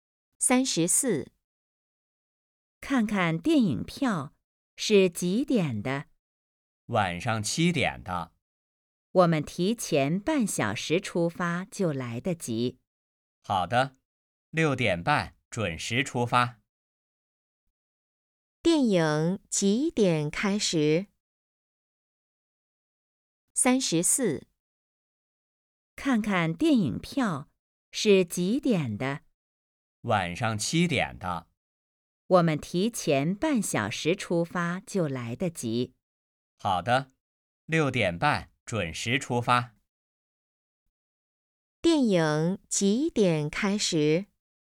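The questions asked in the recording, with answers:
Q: 电影几点开始?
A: 晚上7点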